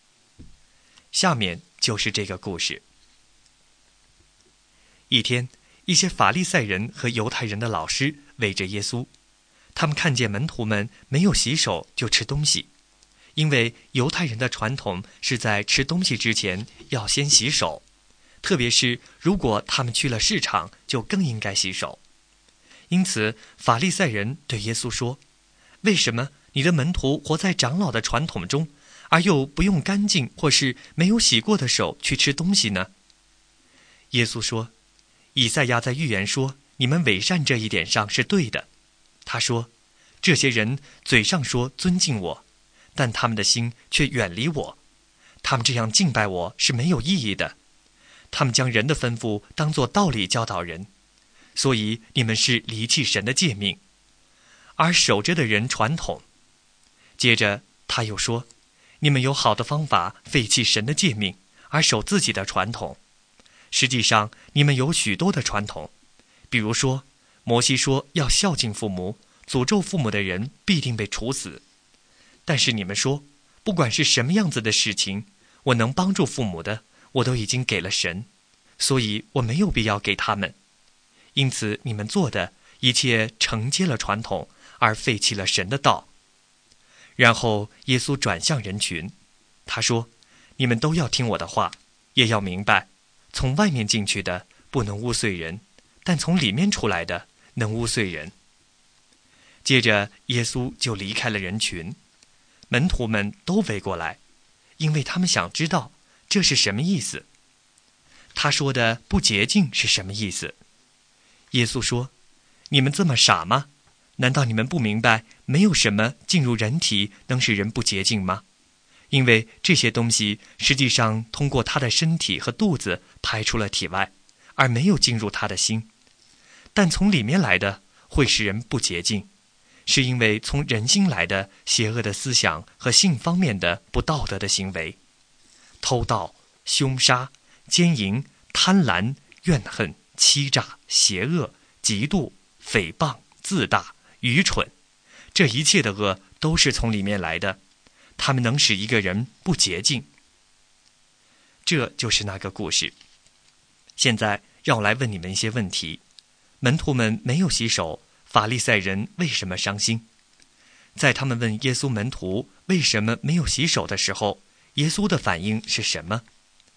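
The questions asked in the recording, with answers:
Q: 门徒们没有洗手,法利赛人为什么伤心?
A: 因为按犹太人的传统,吃东西之前要先洗手

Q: 在他们问耶稣门徒为什么没有洗手的时候,耶稣的反应是什么?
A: 他说他们伪善,离弃神的诫命而守人的传统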